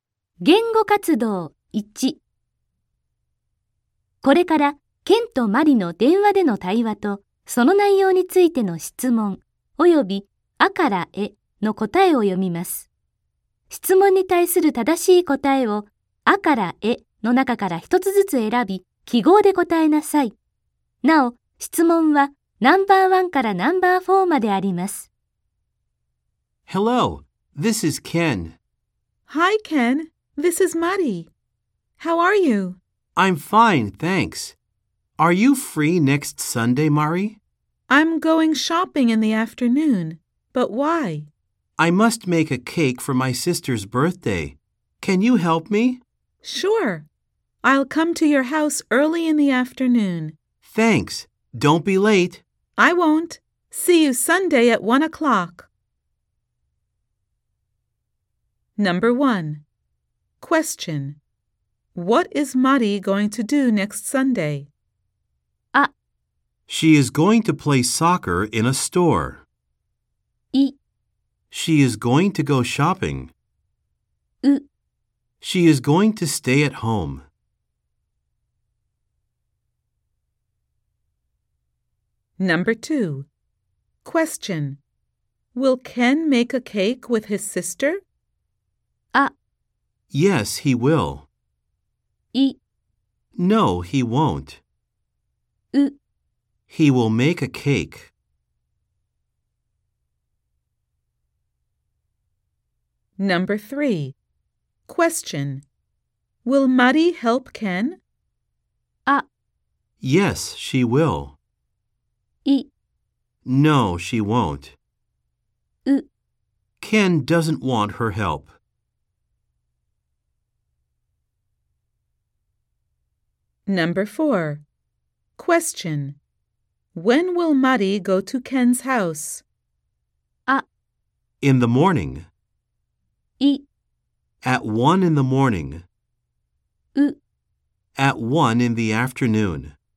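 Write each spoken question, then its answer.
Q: Will Mari help Ken?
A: ア: Yes, she will.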